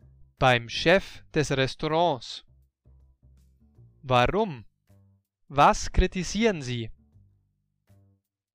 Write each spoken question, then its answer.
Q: Warum? Was kritisieren Sie?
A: Sie kritisieren, dass Susi sehr unhöflich ist.